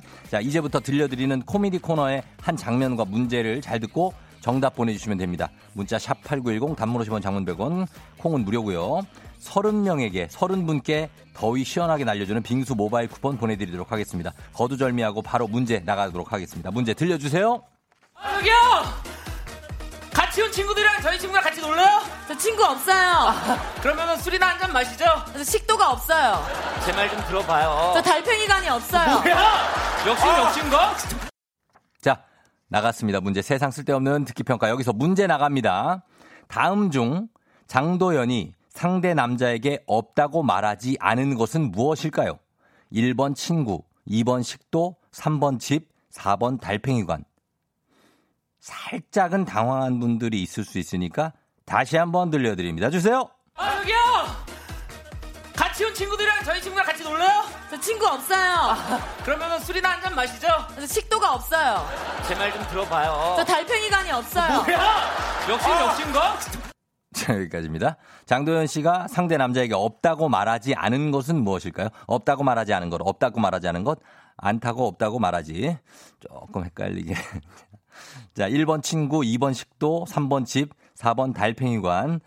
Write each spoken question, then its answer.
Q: 다음 중 장도연이 상대 남자에게 없다고 말하지 않은 것은 무엇일까요?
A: 정답은 3번. 집입니다, 집.